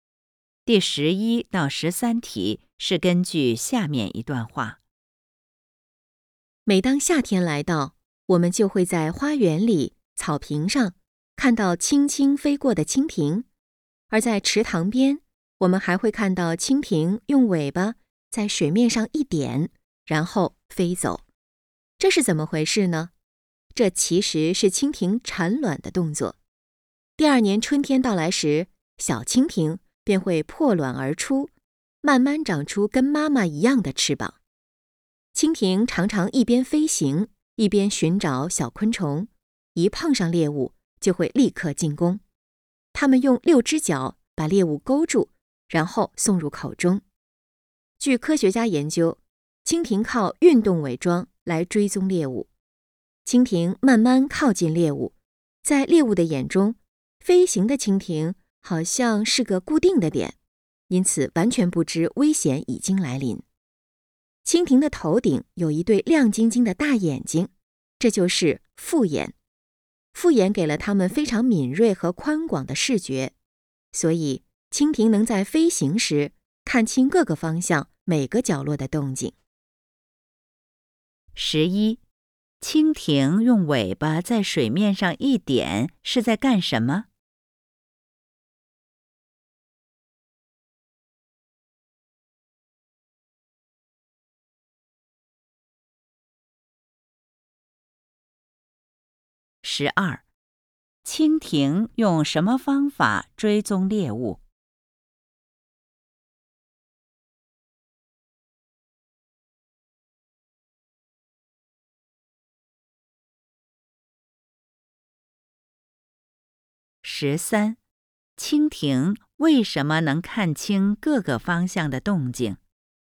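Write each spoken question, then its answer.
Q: 蜻蜓用尾巴在水面上一点是在干什么?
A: 产卵

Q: 蜻蜓用什么方法追踪猎物?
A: 运动伪装

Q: 蜻蜓为什么能看清各个方向的动静?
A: 因为它有复眼,视觉敏锐宽广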